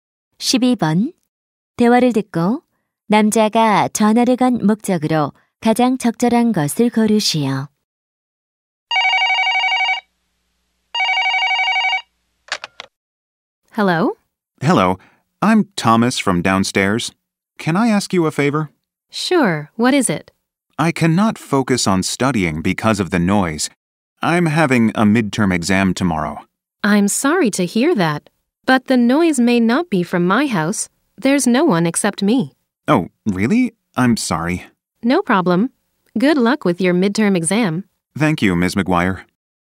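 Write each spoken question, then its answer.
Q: 대화를 듣고 남자가 전화를 건 목적으로 가장 적절한 것을 고르시오.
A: 소음에 대해 항의하려고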